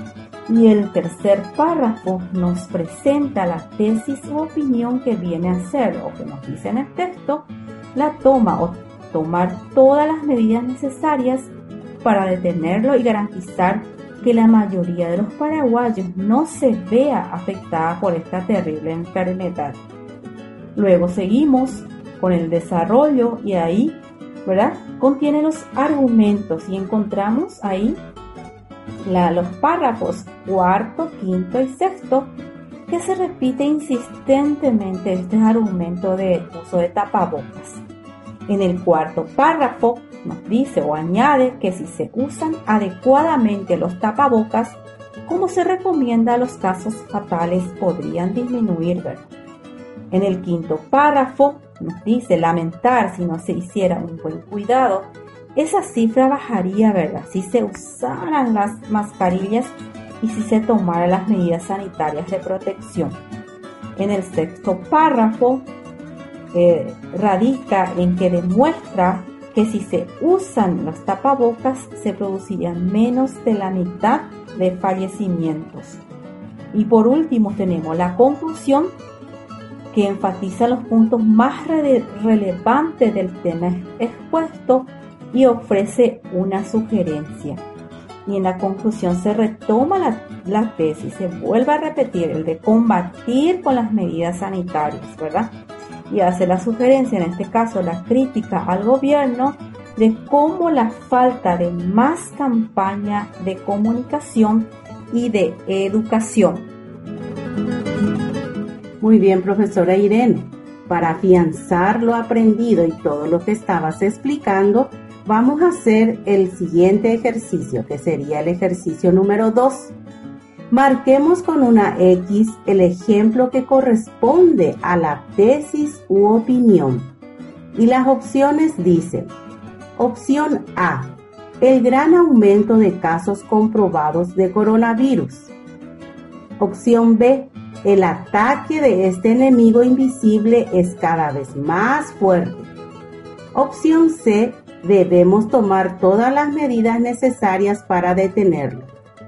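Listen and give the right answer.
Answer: C: debemos tomar todas las medidas necesarias para detenerlo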